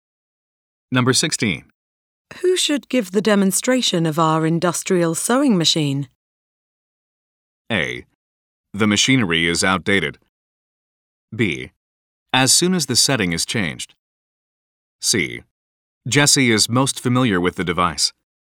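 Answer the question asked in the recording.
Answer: C: Jesse is most familiar with the device.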